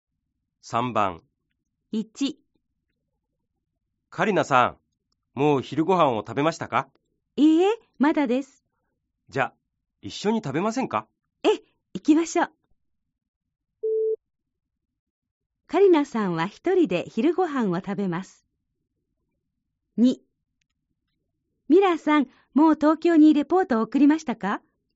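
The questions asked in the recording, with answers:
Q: カリナさんは一人で昼ご飯を食べます。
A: ×(いいえ、一緒に食べます)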